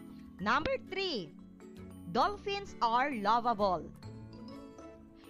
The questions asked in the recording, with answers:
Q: Dolphins are lovable.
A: Yes, this is an opinion.